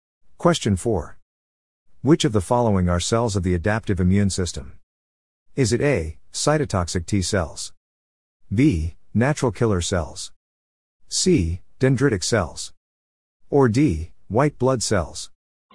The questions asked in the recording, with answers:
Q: Which of the following are cells of the adaptive immune system?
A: The answer is A. Cytotoxic T cells.